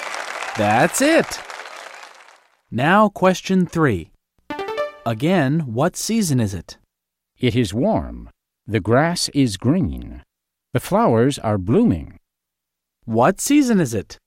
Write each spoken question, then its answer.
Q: Again, what season is it?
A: That's easy. It's spring.